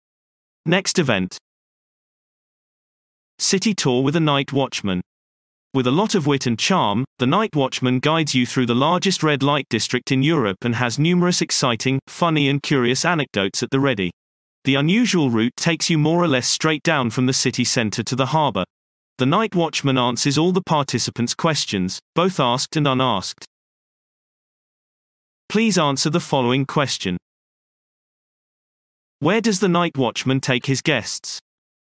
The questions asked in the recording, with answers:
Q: Where does the night watchman take his guests?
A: The night watchman leads his guests from the city center to the harbor directly into the largest red light district in Europe.